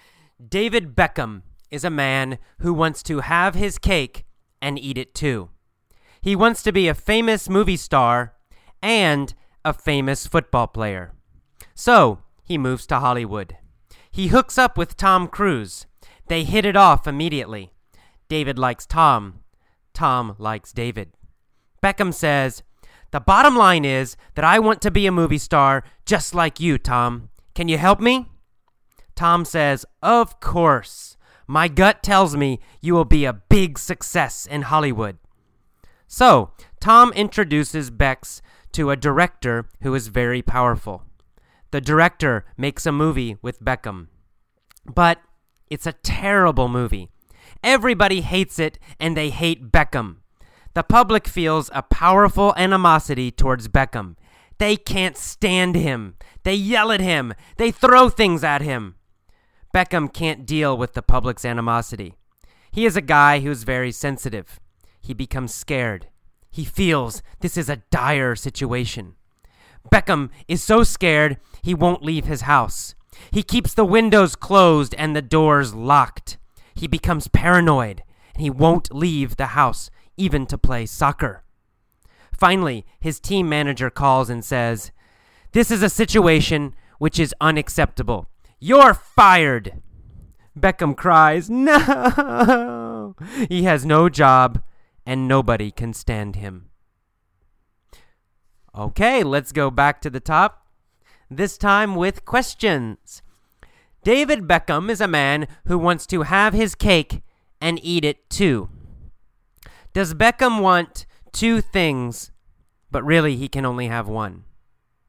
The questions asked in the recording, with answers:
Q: Does Beckham want two things, but really he can only have one?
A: Yes, that's the exact meaning of to have his cake and eat it too.